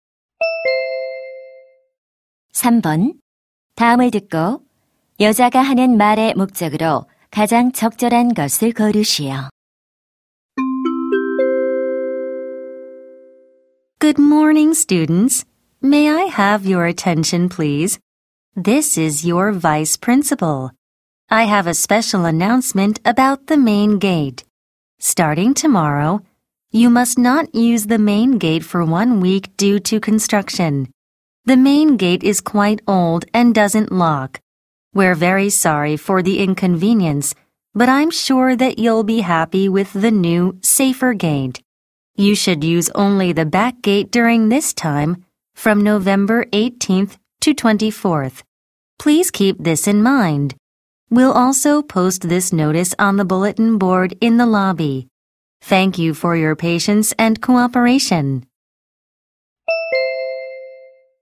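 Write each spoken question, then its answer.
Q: 다음을 듣고 여자가 하는 말의 목적으로 가장 적절한 것을 고르시오.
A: 공사로 인해 일주일간 정문 사용이 금지됨을 알리려고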